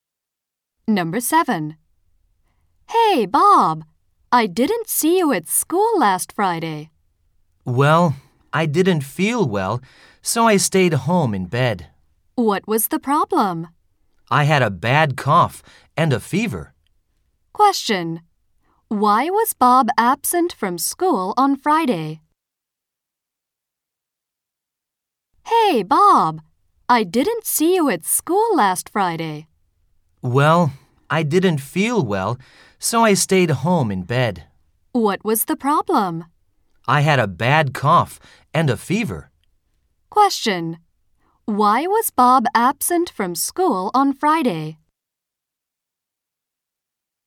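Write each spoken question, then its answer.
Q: Why was Bob absent from school on Friday?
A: He was sick with a bad cough and a fever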